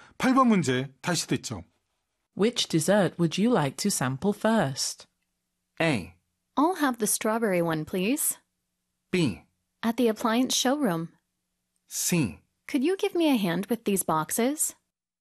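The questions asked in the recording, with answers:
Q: Which dessert would you like to sample first?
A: A: I'll have the strawberry one, please.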